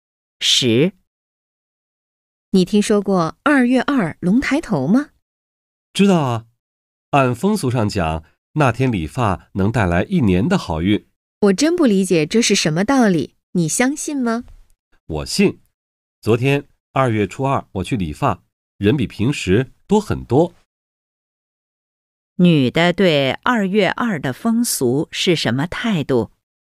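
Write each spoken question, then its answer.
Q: 女的对2月2的风俗是什么态度?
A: 相信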